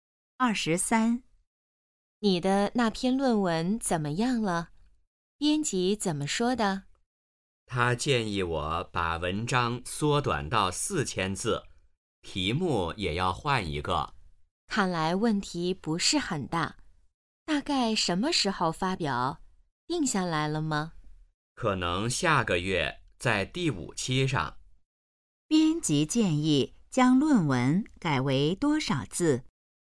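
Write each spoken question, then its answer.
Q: 编辑建议将论文改为多少字?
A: 4000字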